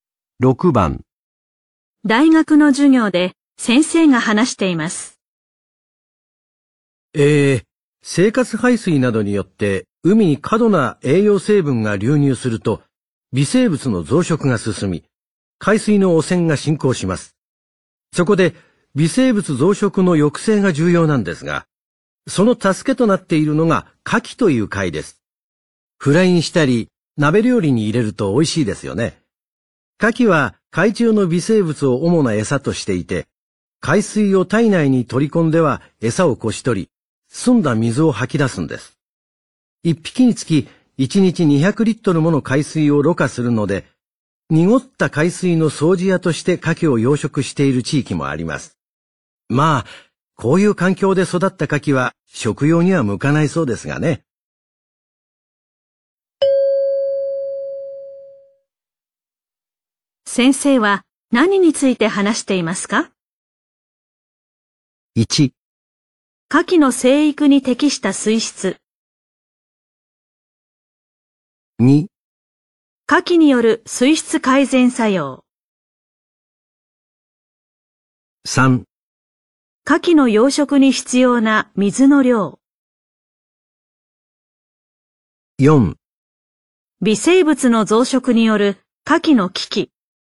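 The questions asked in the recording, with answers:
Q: 先生は何について話していますか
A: 2: 牡蠣による水質改善作用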